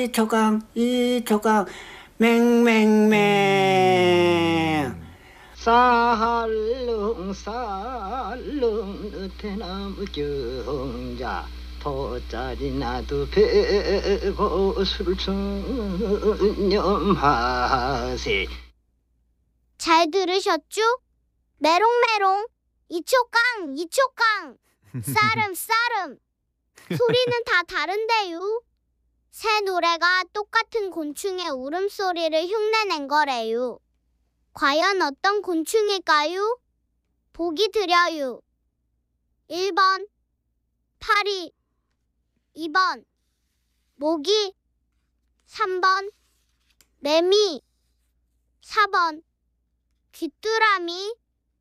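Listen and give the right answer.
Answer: 3: 매미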